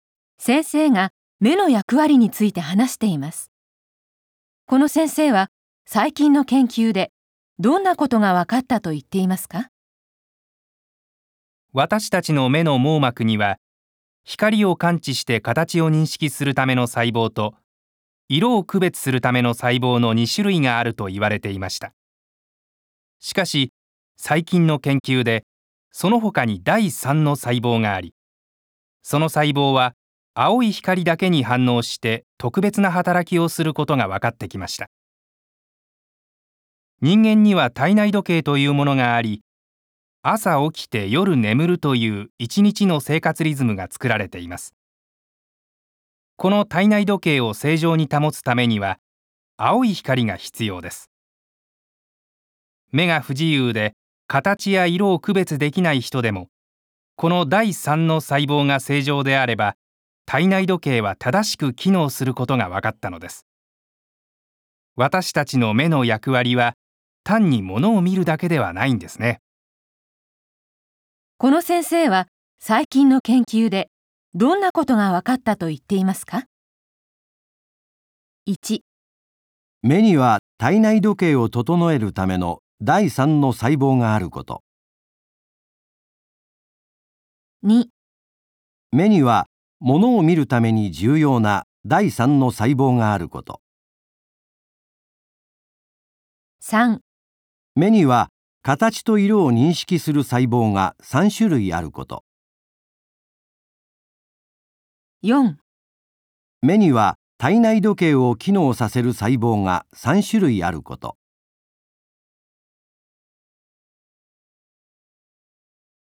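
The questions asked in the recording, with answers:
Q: この先生は、最近の研究で、どんなことが分かったと言っていますか?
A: 1: 目には体内時計を整えるための第3の細胞があること。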